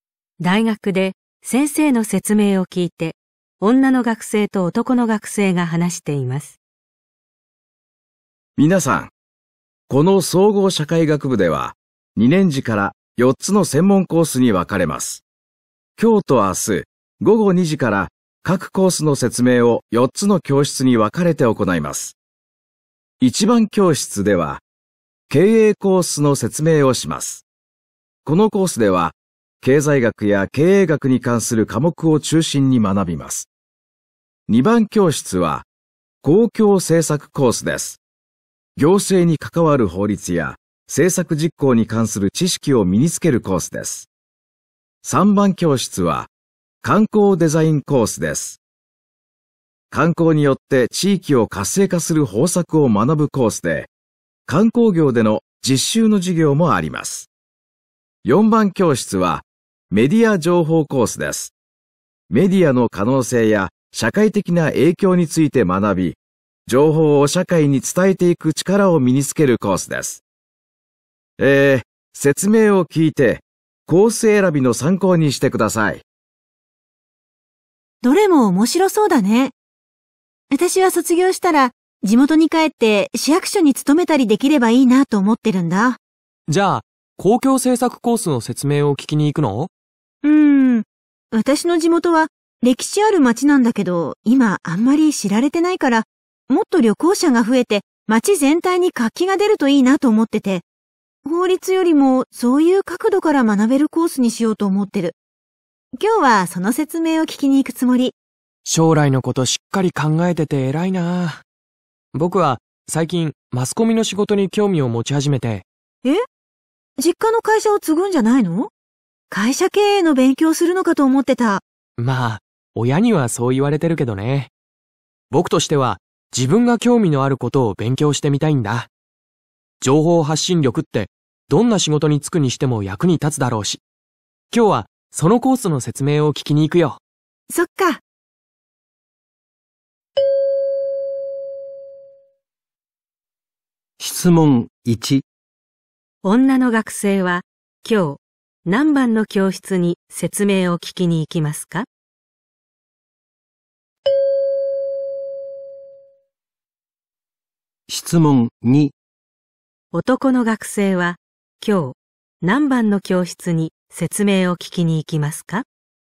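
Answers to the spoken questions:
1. 3番教室
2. 4番教室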